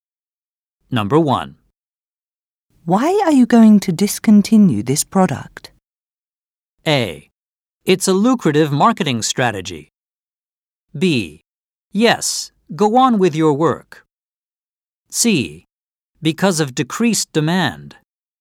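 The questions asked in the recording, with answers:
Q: Why are you going to discontinue this product?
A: C: Because of decreased demand.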